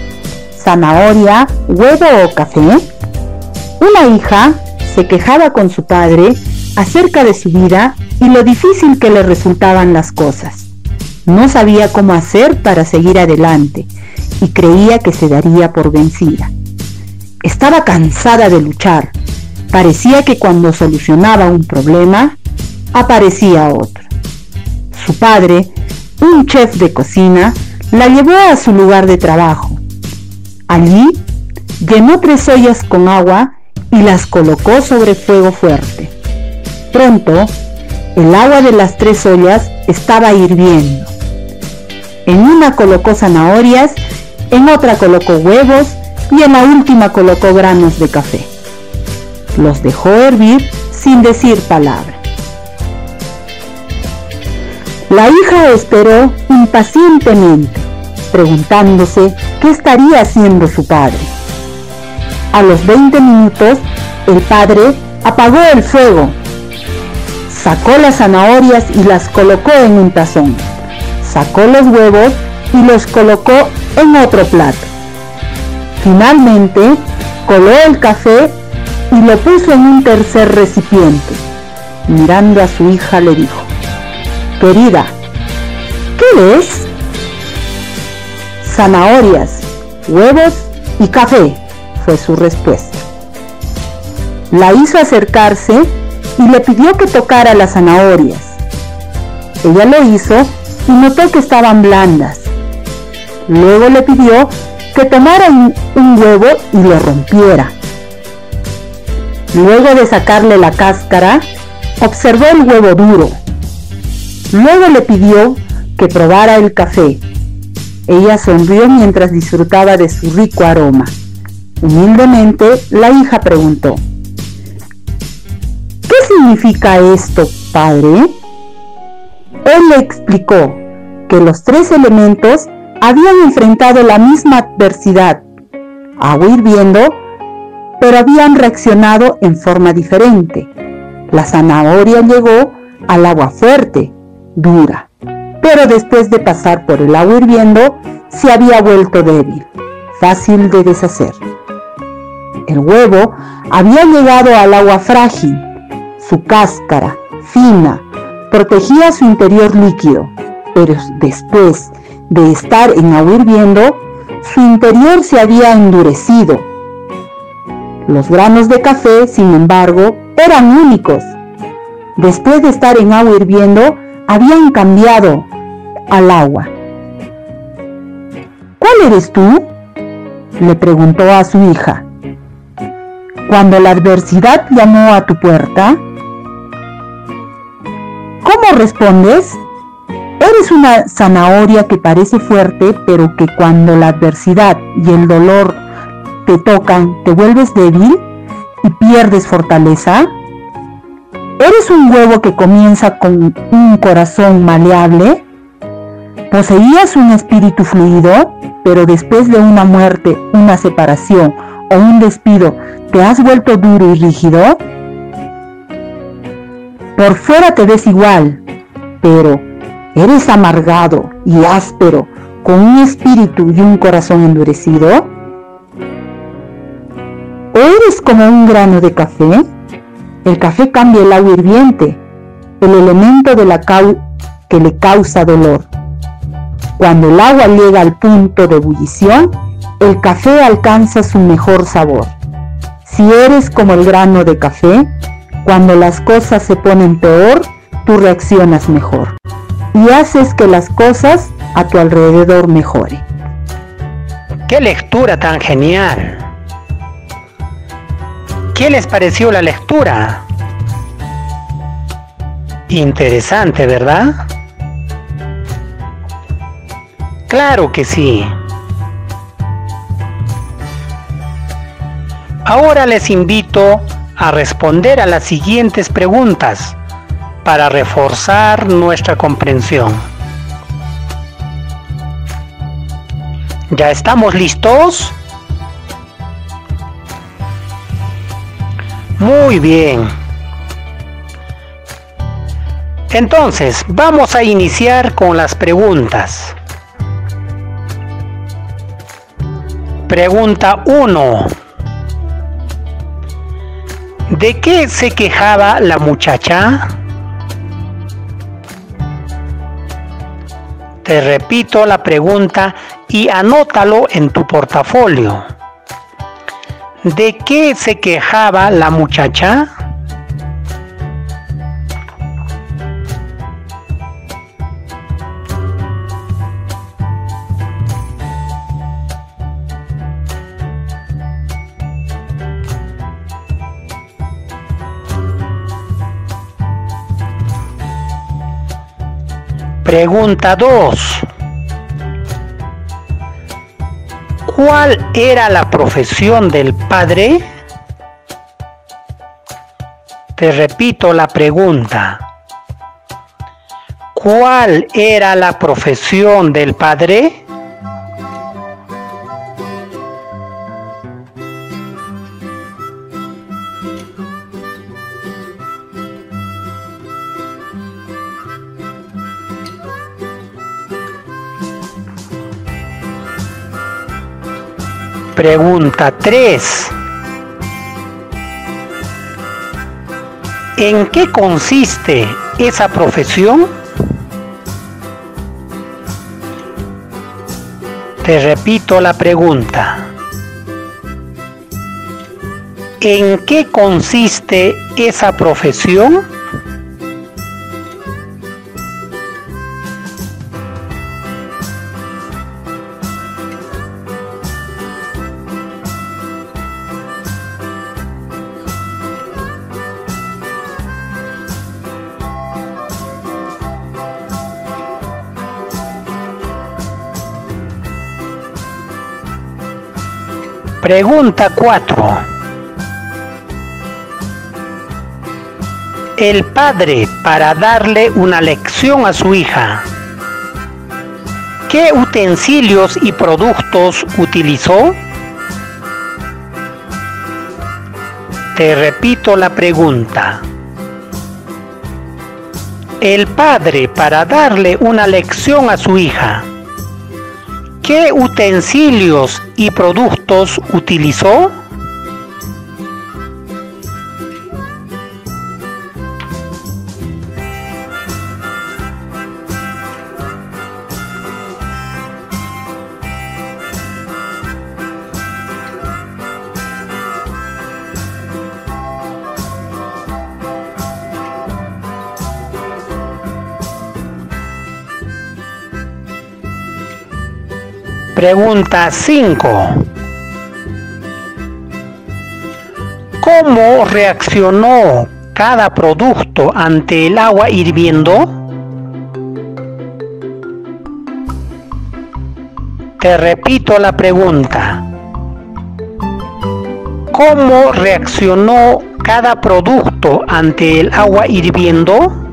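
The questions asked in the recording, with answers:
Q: ¿De qué se quejaba la muchacha?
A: De su vida y lo difícil que le resultaban las cosas

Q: ¿Cuál era la profesión del padre?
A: Chef de cocina

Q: El padre, para darle una lección a su hija, ¿qué utensilios y productos utilizó?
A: Tres ollas con agua hirviendo, zanahorias, huevos y granos de café (y un tazón, un plato y un recipiente)

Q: ¿Cómo reaccionó cada producto ante el agua hirviendo?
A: La zanahoria se volvió blanda y débil, el interior del huevo se endureció y el café cambió el agua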